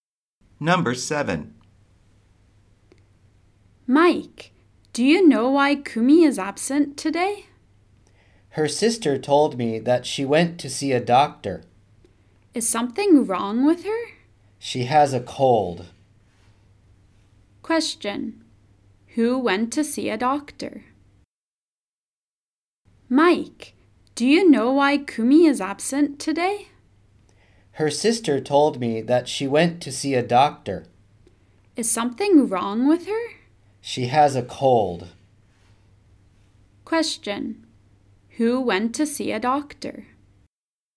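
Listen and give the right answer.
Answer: Kumi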